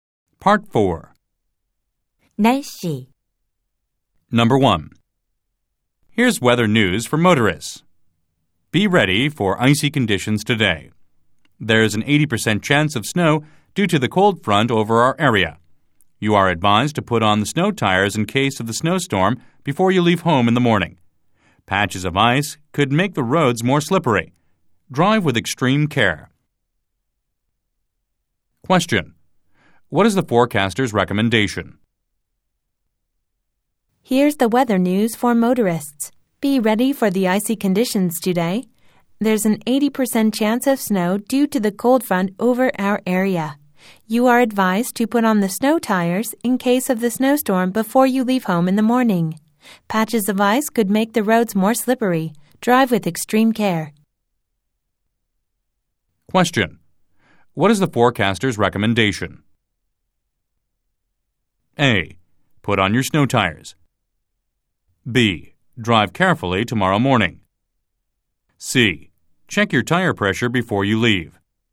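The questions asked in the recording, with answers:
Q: What is the forecaster's recommendation?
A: A: Put on your snow tires.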